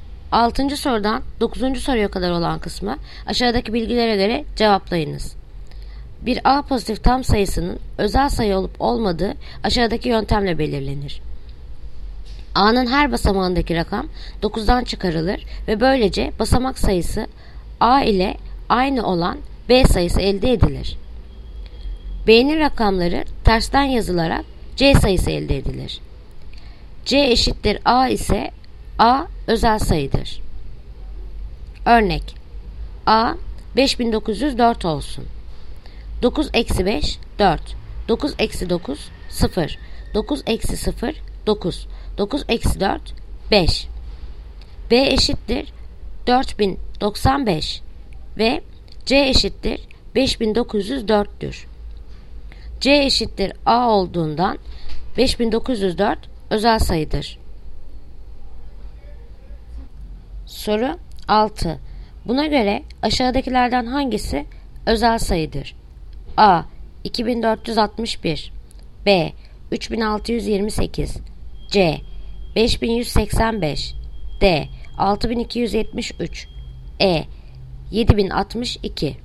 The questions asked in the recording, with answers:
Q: Buna göre aşağıdakilerden hangisi özel sayıdır?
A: Yanıt Denizli 6273.